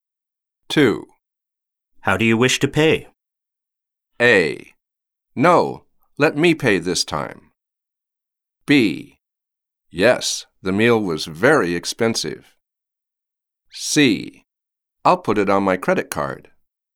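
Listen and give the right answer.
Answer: C: I'll put it on my credit card.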